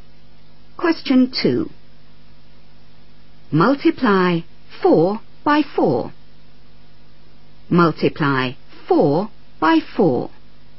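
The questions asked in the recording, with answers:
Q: Multiply 4 by 4.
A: 16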